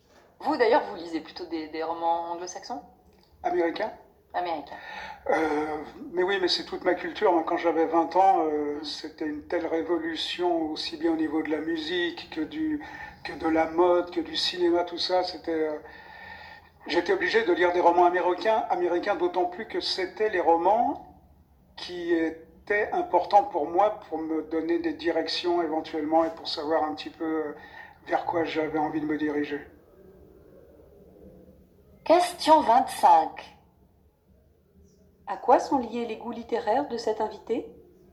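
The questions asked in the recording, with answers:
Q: À quoi sont liés les goûts littéraires de cet invité?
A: À sa jeunesse : la culture américaine qui l'a marqué à 20 ans (musique, mode, cinéma)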